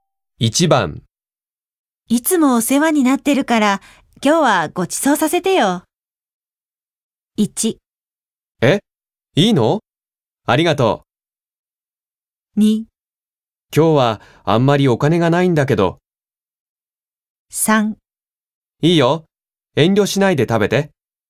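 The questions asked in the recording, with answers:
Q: いつもお世話になってるから今日はごちそうさせてよ。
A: 1: え?いいの?ありがとう。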